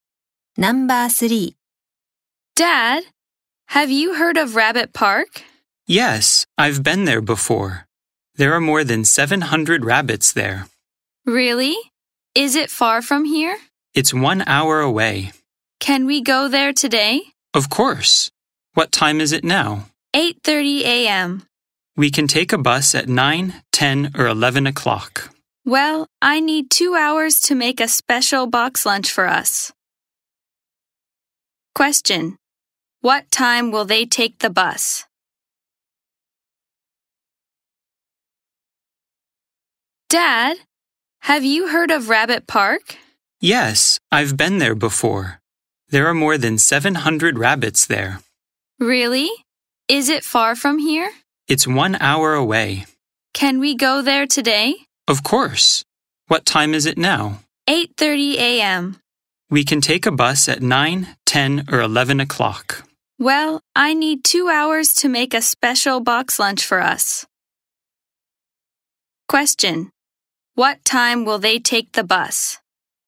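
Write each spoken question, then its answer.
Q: What time will they take the bus?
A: At 11 o'clock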